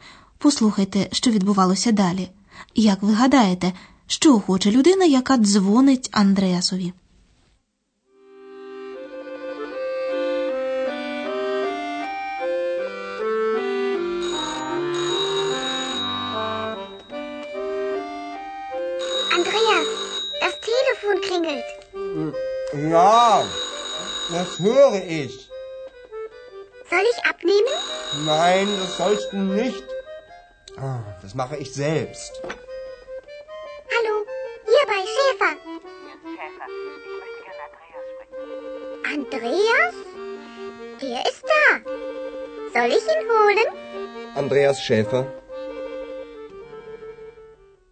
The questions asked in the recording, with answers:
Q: Як ви гадаєте, що хоче людина, яка дзвонить Андреасові?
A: Жінка, яка телефонувала, хотіла поговорити з Андреасом.